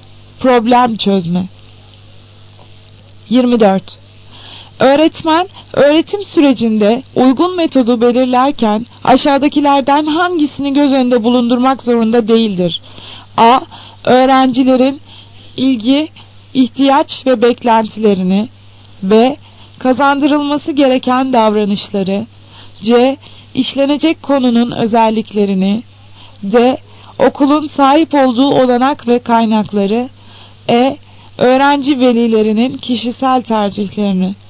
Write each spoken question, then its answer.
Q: Öğretmen, öğretim sürecinde uygun metodu belirlerken aşağıdakilerden hangisini göz önünde bulundurmak zorunda değildir?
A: Cevap E şıkkı. Öğrenci velilerinin kişisel tercihlerini.